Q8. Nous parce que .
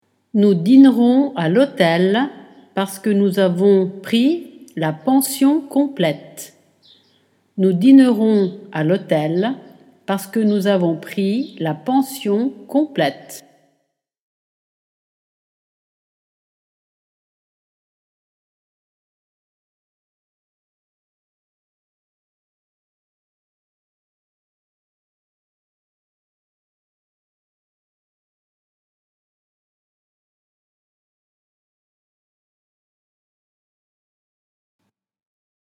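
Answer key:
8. dînerons à l'hôtel / nous avons pris la pension complète

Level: Dettato di francese A2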